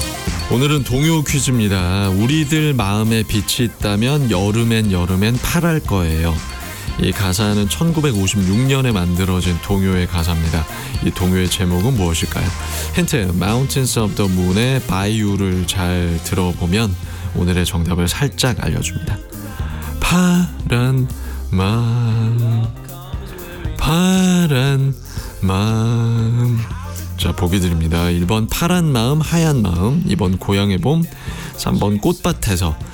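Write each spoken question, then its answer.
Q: 이 동요의 제목은 무엇일까요?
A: 1번: 파란 마음, 하얀 마음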